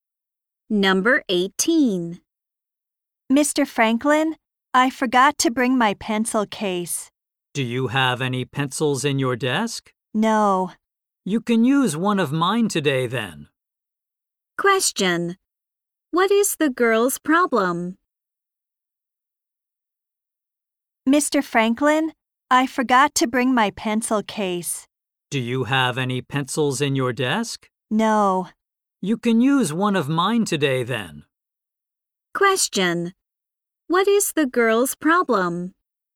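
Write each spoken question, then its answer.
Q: What is the girl's problem?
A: She forgot her pencil case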